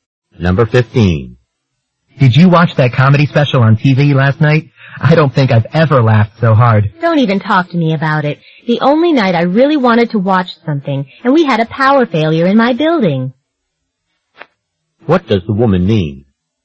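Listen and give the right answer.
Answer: She couldn't watch the show because of a power failure.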